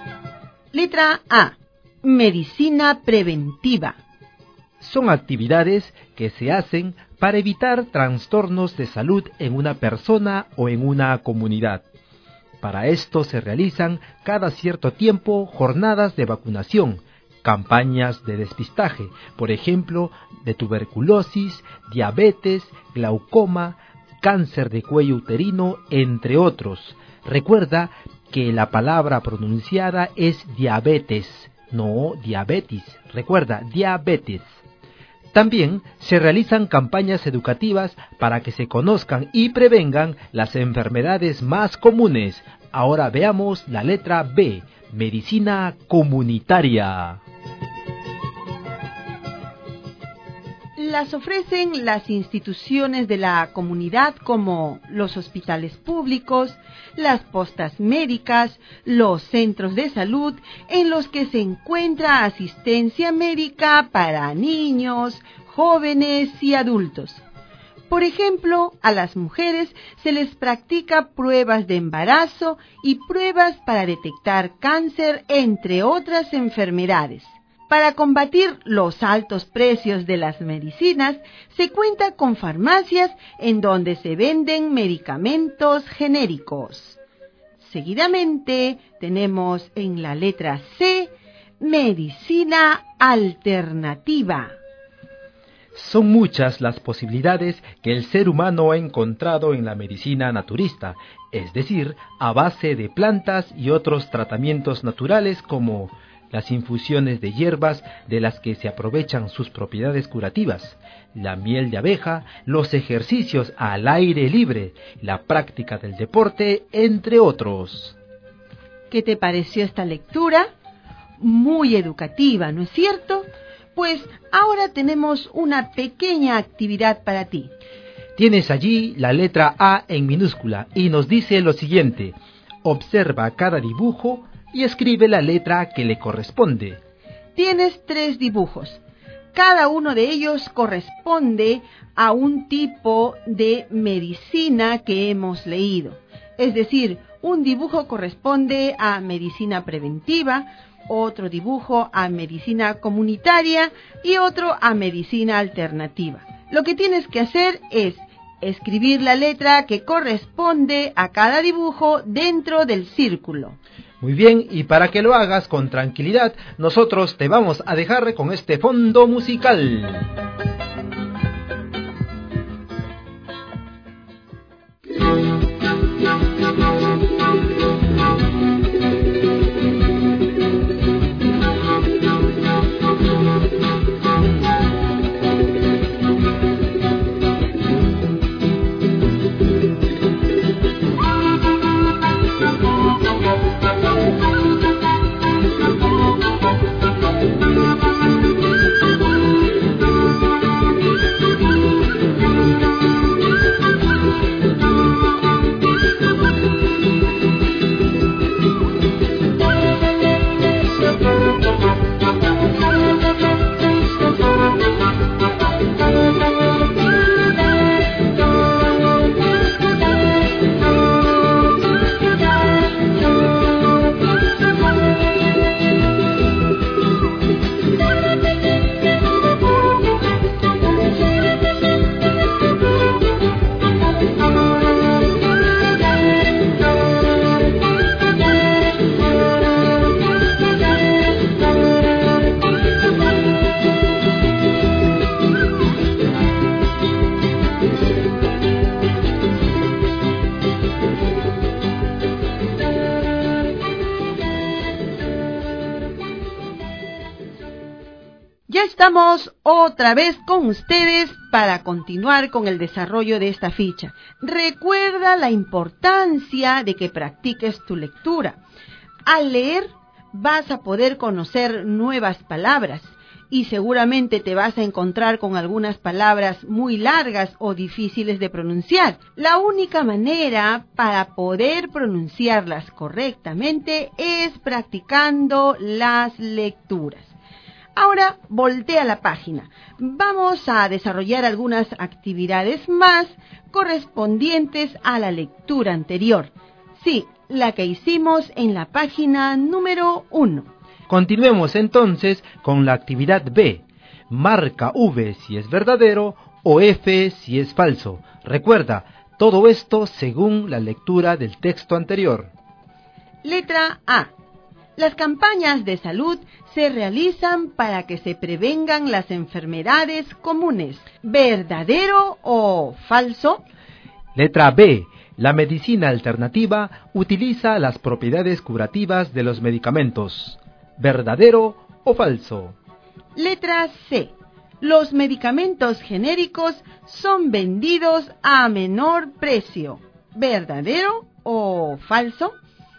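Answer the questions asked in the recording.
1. Verdadero
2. Falso
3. Verdadero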